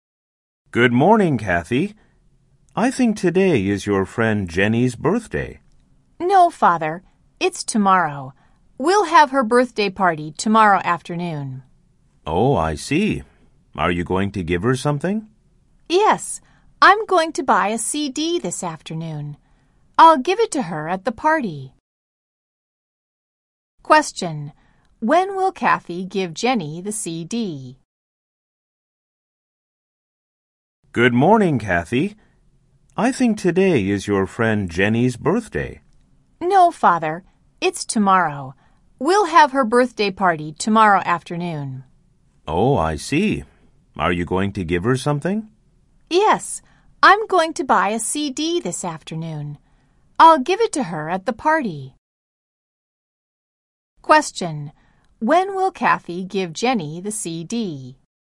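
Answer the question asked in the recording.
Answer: At Jenny's birthday party tomorrow afternoon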